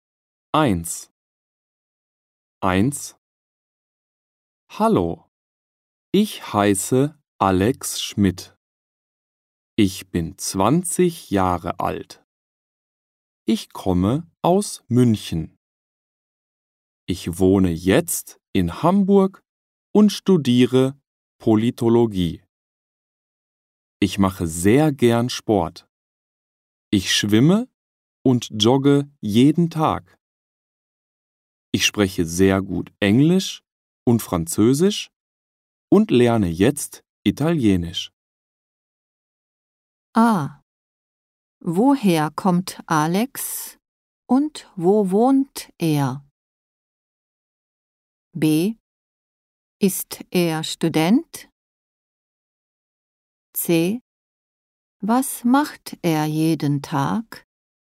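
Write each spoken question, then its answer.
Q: Ah, woher kommt Alex und wo wohnt er?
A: Aus München; er wohnt in Hamburg.

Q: Ist er Student?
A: Ja, er studiert Politologie.

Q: Was macht er jeden Tag?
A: Er schwimmt und joggt.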